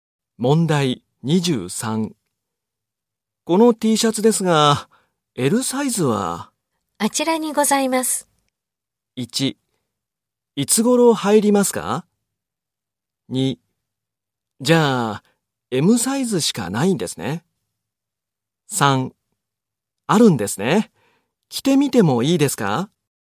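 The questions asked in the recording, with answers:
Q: この T シャツですが、L サイズは?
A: 2: あるんですね。着てみてもいいですか?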